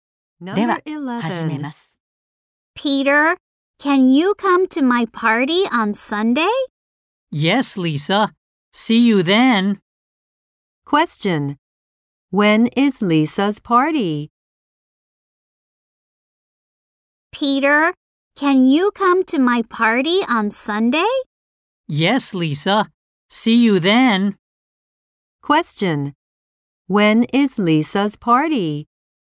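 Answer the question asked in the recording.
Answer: On Sunday.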